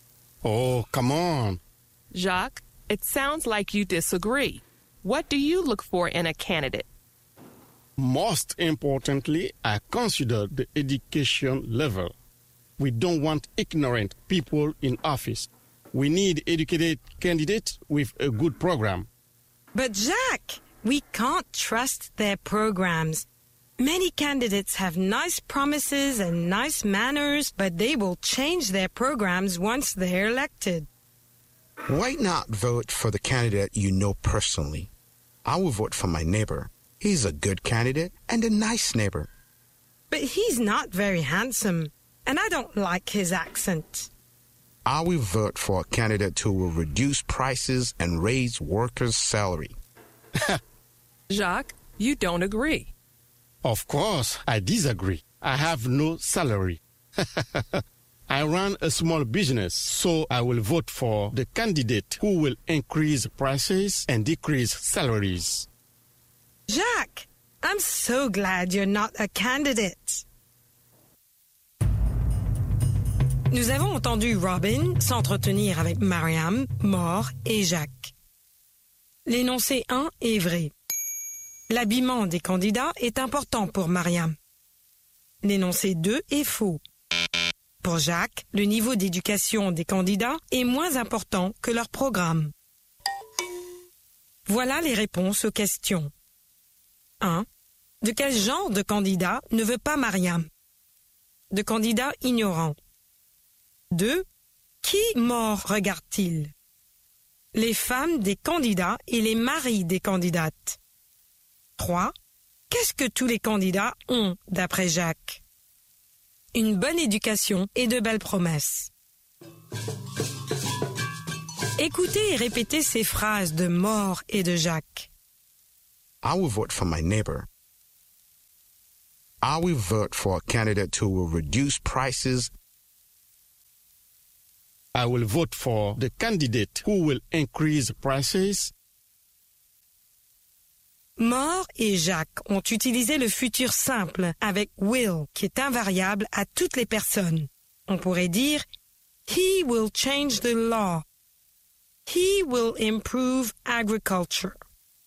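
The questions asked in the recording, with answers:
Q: L'habillement des candidats est important pour Mariam.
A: Vrai

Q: Pour Jacques, le niveau d'éducation des candidats est moins important que leur programme.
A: Faux

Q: Qui mort regarde-t-il?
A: Les épouses ou les maris des candidats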